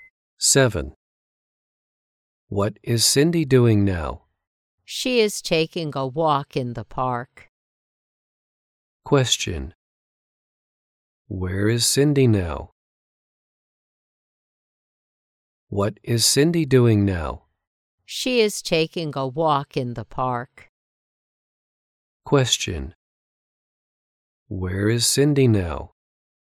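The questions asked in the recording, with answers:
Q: Where is Cindy now?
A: In the park.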